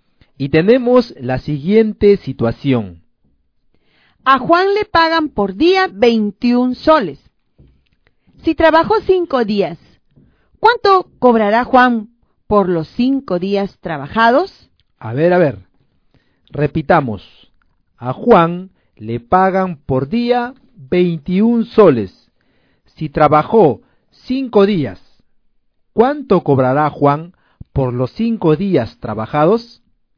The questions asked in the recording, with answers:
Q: Si trabajó 5 días, ¿cuánto cobrará Juan por los 5 días trabajados?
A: Por lo tanto, Juan cobrará 105 soles.